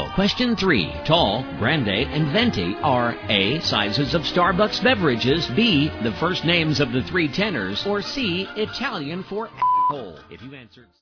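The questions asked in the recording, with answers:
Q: Tall, grande, and venti are A.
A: A: sizes of Starbucks beverages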